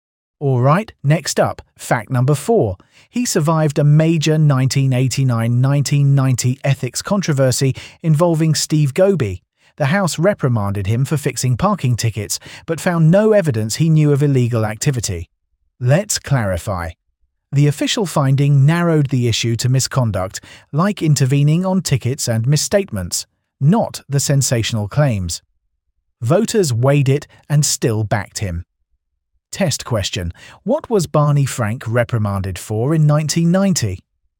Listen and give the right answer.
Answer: Fixing parking tickets.